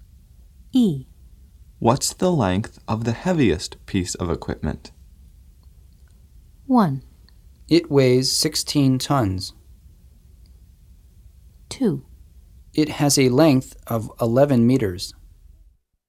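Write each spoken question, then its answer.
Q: What's the length of the heaviest piece of equipment?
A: 2: It has a length of 11 meters.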